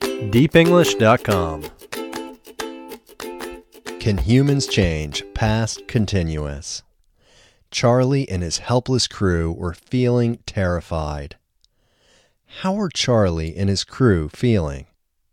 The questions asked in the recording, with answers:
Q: How are Charlie and his crew feeling?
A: Charlie and his crew were feeling terrified.